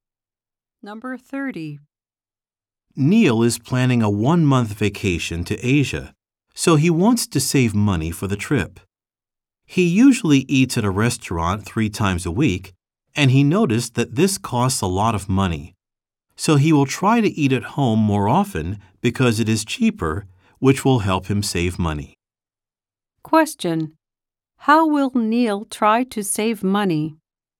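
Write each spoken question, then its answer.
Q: How will Neil try to save money?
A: By eating at home more often.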